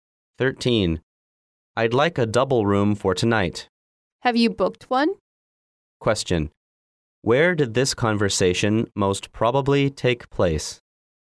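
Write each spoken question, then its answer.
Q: Where did this conversation most probably take place?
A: In a hotel.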